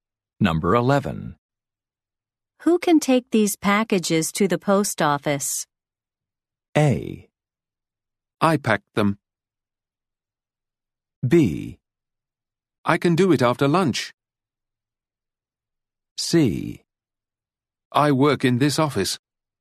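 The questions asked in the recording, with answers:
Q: Who can take these packages to the post office?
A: B: I can do it after lunch.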